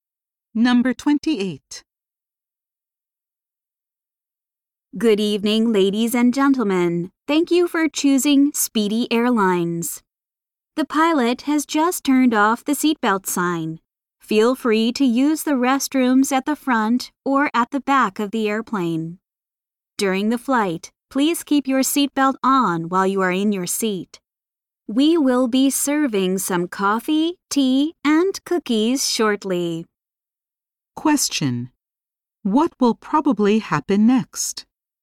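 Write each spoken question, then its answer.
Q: What will probably happen next?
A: Coffee, tea, and cookies will be served.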